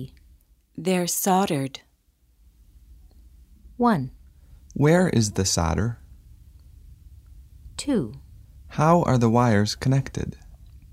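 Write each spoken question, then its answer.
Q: How are the wires connected?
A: They're soldered.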